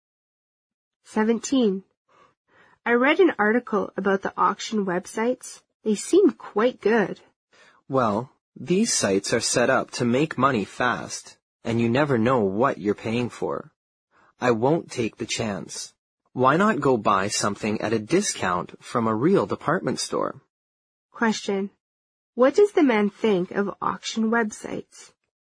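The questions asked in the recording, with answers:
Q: What does the man think of auction websites?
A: They are risky; you never know what you're paying for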